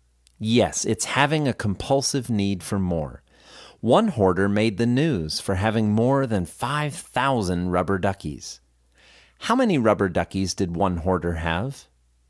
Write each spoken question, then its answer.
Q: How many rubber duckies did one hoarder have?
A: One hoarder had 5,000 rubber duckies.